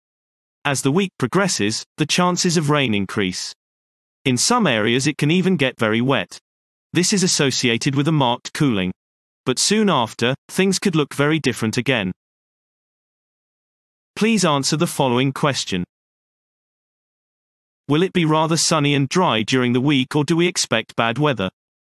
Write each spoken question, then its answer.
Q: Will it be rather sunny and dry during the week, or do we expect bad weather?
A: So, bad weather is predicted.